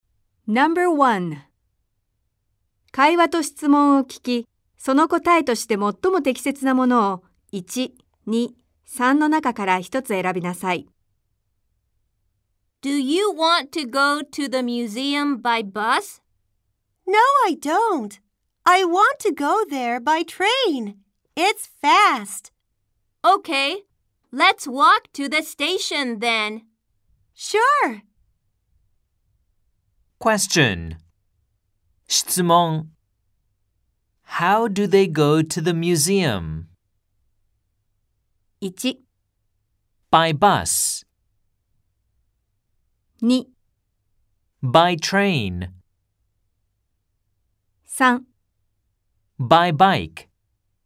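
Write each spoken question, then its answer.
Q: How do they go to the museum?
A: 2: By train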